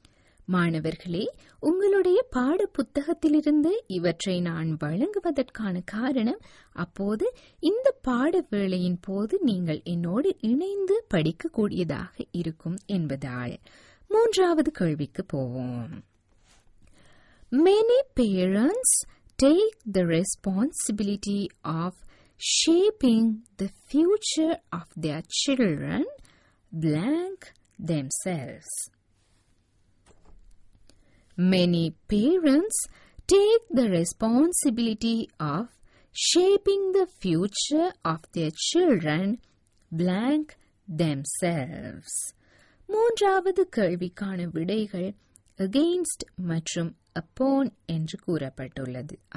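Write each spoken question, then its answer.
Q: Many parents take the responsibility of shaping the future of their children blank themselves.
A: upon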